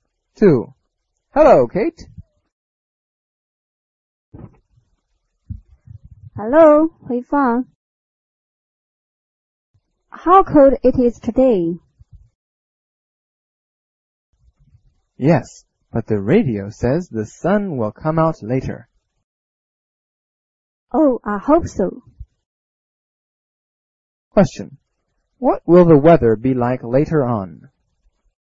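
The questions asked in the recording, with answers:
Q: What will the weather be like later on?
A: Sunny; the sun will come out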